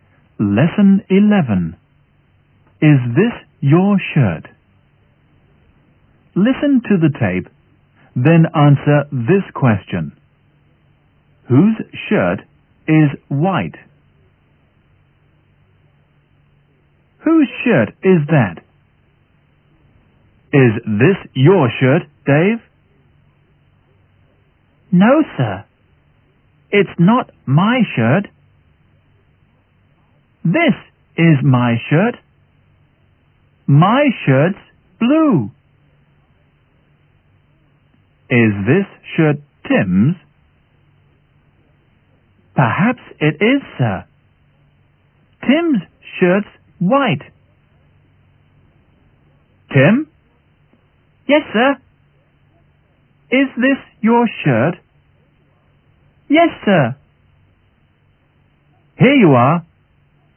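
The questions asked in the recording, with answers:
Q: Whose shirt is white?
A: Tim's shirt is white.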